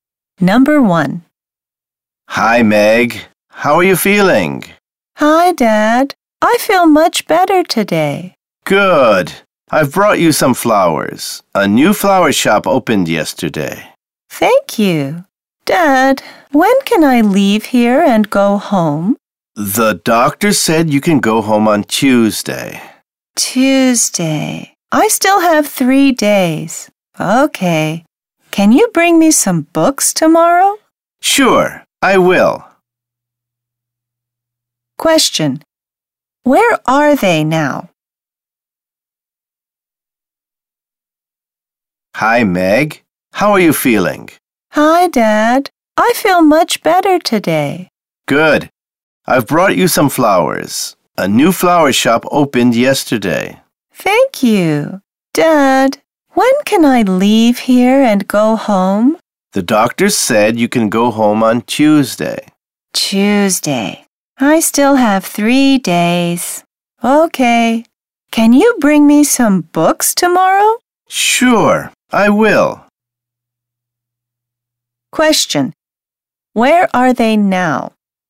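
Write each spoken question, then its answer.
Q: Question. Where are they now?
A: In a hospital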